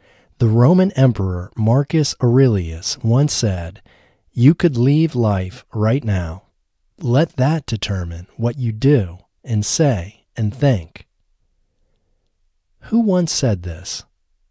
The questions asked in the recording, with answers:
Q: Who once said this?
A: The Roman Emperor Marcus Aurelius once said this.